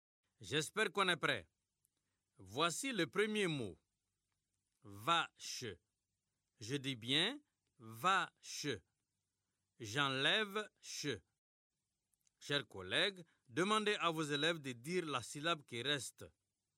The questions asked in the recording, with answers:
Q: J'enlève che. Chers collègues, demandez à vos élèves de dire la syllabe qui reste.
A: Il reste va.